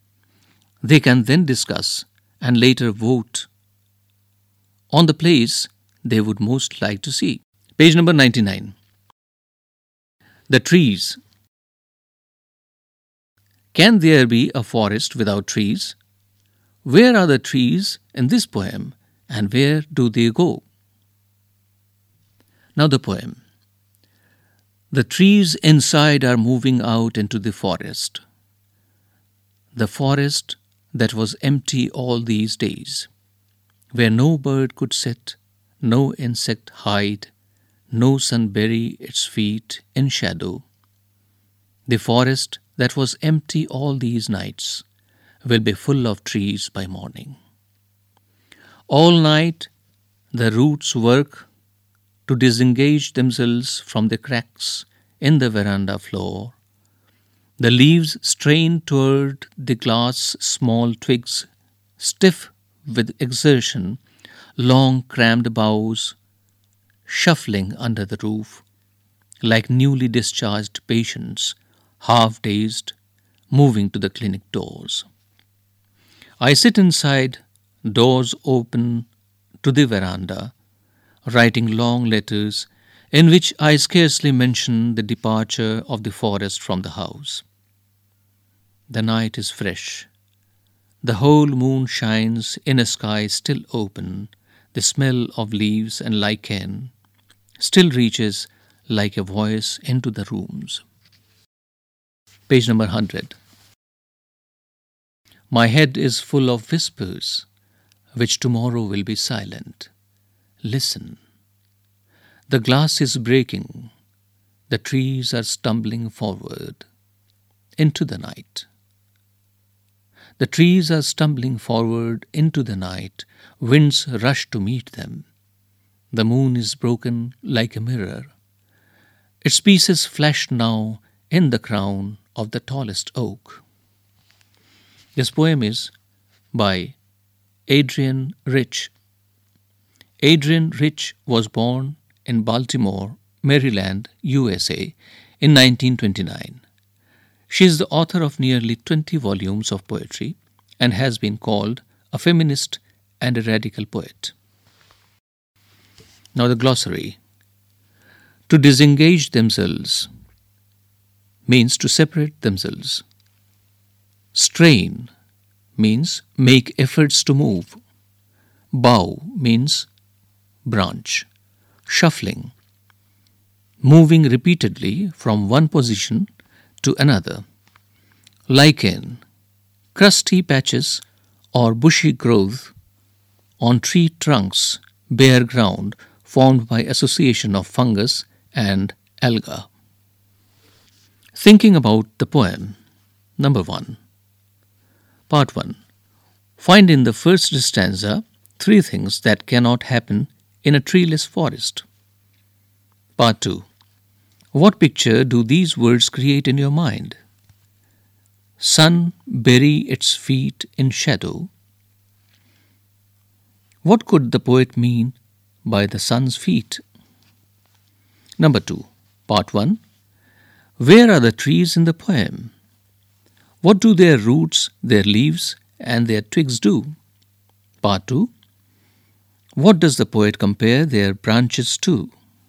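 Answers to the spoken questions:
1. Inside the house, moving out into the forest
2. Newly discharged patients, half dazed, moving to the clinic doors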